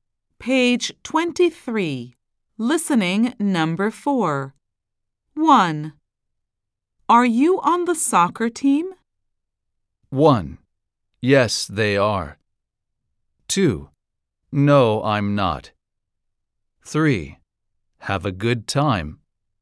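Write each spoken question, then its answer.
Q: Are you on the soccer team?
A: 2: No, I'm not.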